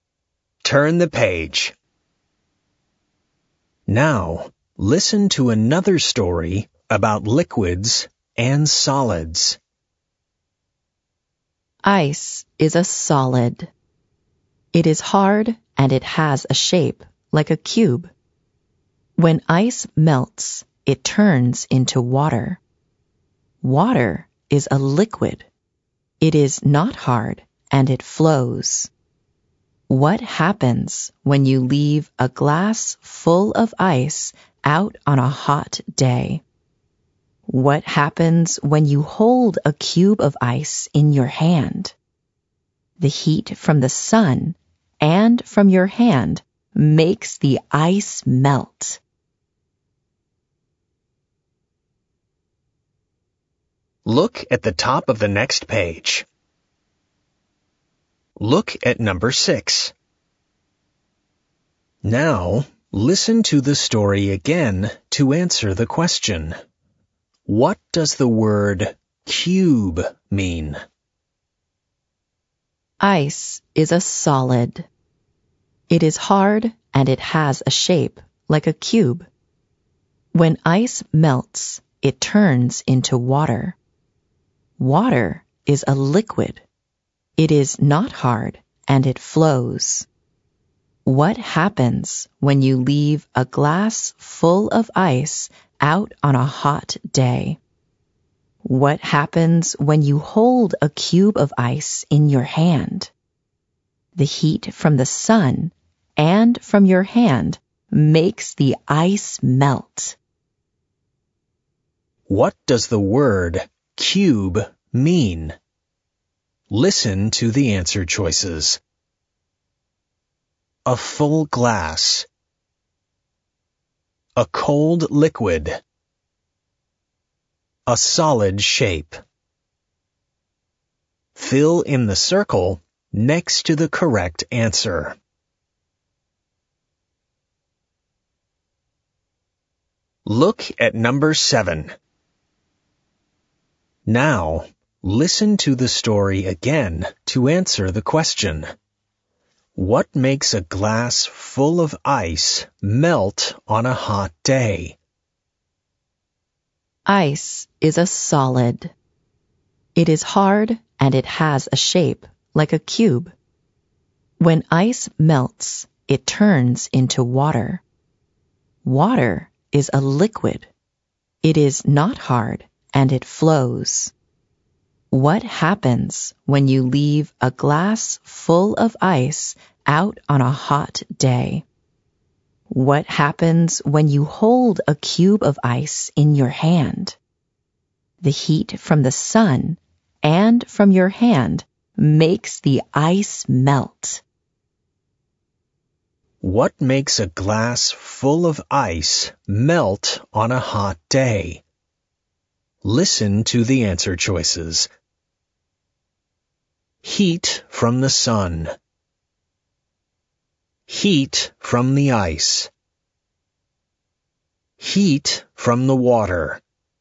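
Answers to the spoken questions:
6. C: A solid shape.
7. A: Heat from the sun.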